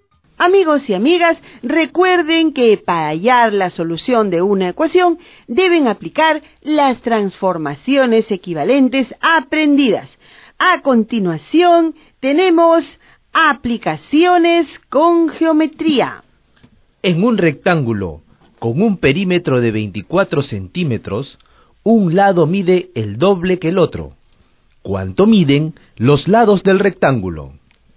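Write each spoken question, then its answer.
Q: ¿Cuánto miden los lados del rectángulo?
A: 4 cm y 8 cm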